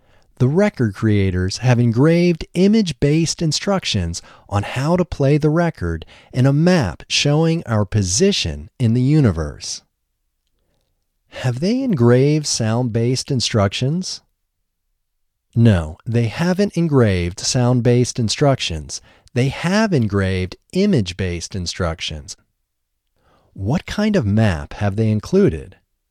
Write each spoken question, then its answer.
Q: What kind of map have they included?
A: They have included a map that shows our position in the universe.